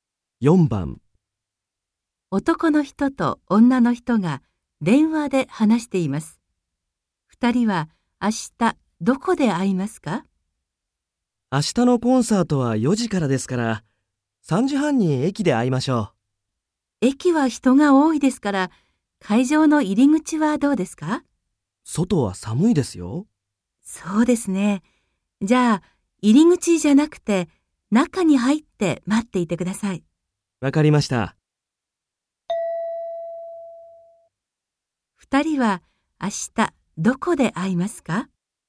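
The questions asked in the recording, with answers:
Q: 2人は明日どこで会いますか?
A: 会場の中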